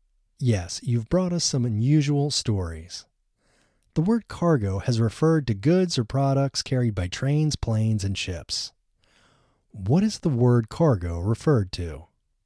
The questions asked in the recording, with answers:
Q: What is the word cargo referred to?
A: The word cargo has referred to goods or products carried by planes, trains, planes, and ships.